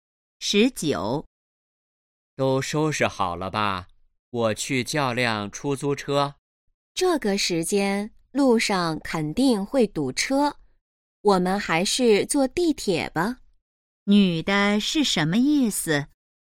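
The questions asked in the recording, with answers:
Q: 女的是什么意思?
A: 坐地铁去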